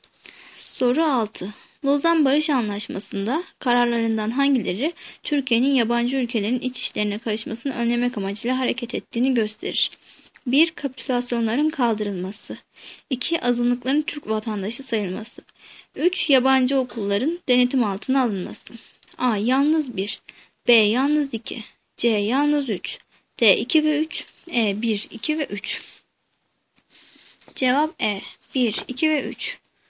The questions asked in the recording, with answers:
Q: Lozan Barış Anlaşması'nda kararlarından hangileri Türkiye'nin yabancı ülkelerin iç işlerine karışmasını önlemek amacıyla hareket ettiğini gösterir?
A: Cevap E. 1, 2 ve 3.